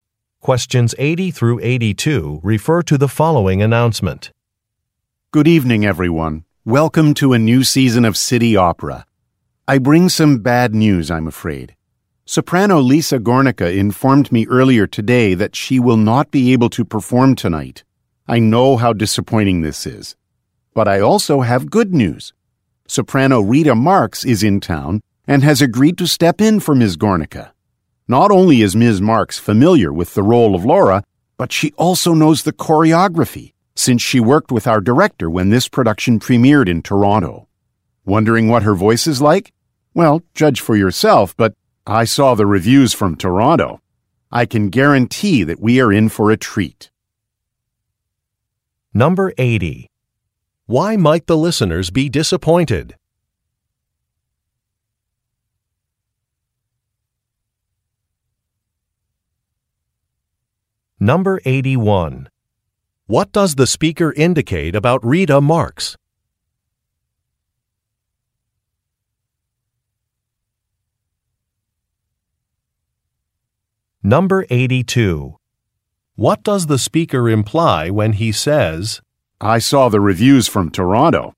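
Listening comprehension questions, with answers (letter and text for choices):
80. Why might the listeners be disappointed?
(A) A performance has been canceled.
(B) A performer will not be appearing.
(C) A new production will be delayed.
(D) A production is not new.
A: (B) A performer will not be appearing.

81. What does the speaker indicate about Rita Marks?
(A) She has flown in from Toronto.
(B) She taught the speaker.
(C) She has experience with a role.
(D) She is a good friend of the speaker's.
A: (C) She has experience with a role.

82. What does the speaker imply when he says, "I saw the reviews from Toronto"?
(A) He attended the opera in Toronto.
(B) An audience disliked Lisa Gornicka.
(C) Critics disagree about Rita Marks's performance.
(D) Rita Marks has been praised for her singing.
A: (D) Rita Marks has been praised for her singing.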